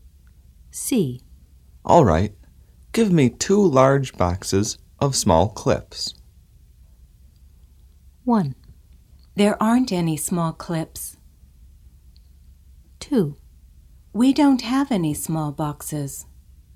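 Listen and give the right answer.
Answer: 2: We don't have any small boxes.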